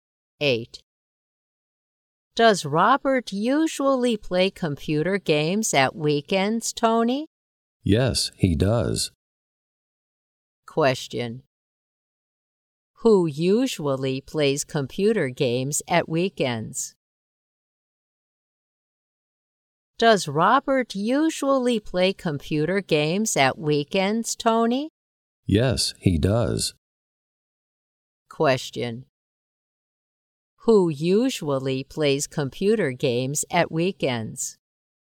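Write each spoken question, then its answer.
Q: Who usually plays computer games at weekends?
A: Robert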